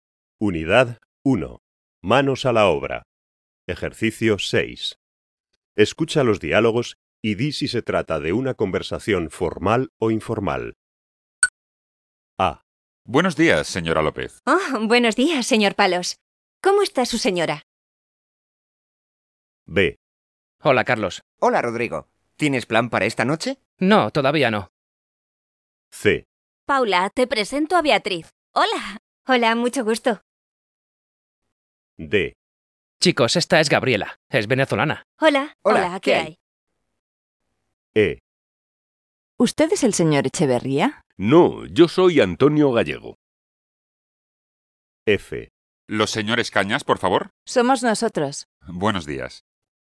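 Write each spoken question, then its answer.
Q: Escucha los diálogos y di si se trata de una conversación formal o informal.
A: formal

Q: Escucha los diálogos y di si se trata de una conversación formal o informal.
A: informal

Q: Escucha los diálogos y di si se trata de una conversación formal o informal.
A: informal

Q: Escucha los diálogos y di si se trata de una conversación formal o informal.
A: informal

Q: Escucha los diálogos y di si se trata de una conversación formal o informal.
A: formal

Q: Escucha los diálogos y di si se trata de una conversación formal o informal.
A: formal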